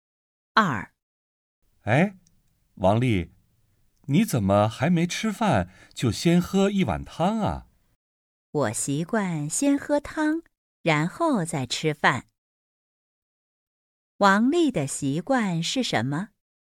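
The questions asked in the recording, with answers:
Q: 王丽的习惯是什么?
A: 先喝汤,然后再吃饭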